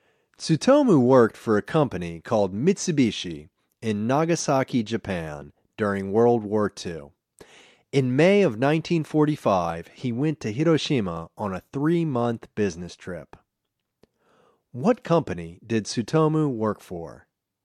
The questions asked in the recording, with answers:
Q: What company did Tsutomu work for?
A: He worked for Mitsubishi.